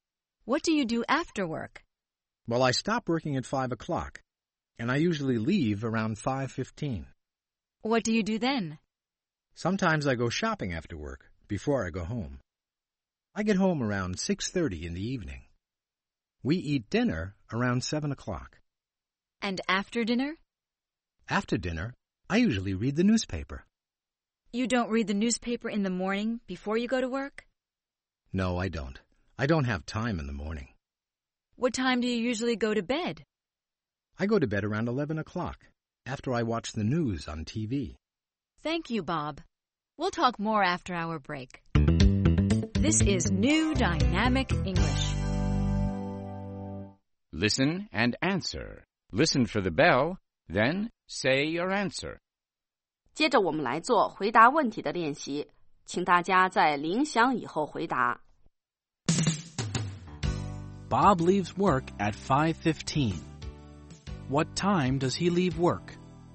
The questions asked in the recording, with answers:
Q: What time does he leave work?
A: He leaves work at 5:15.